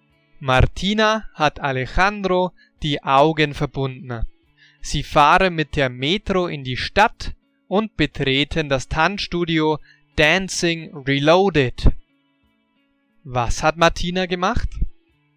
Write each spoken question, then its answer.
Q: Was hat Martina gemacht?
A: Sie hat Alejandro die Augen verbunden.